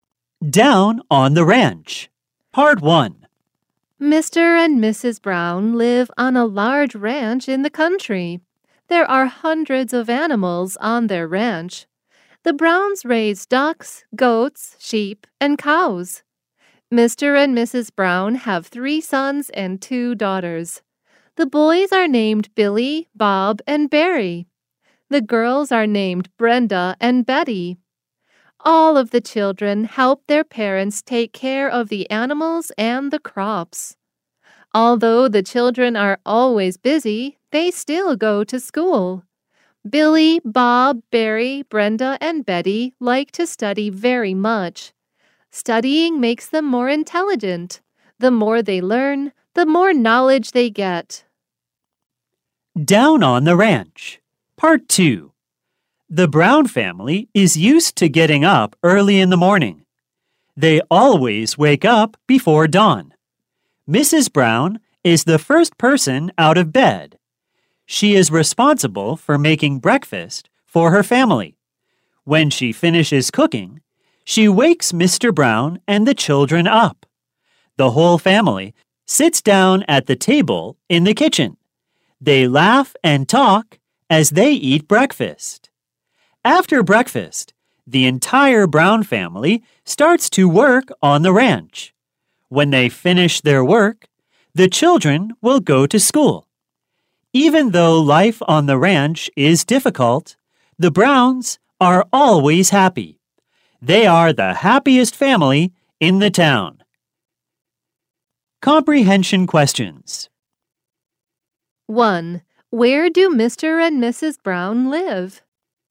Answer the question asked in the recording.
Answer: They live on a large ranch in the country.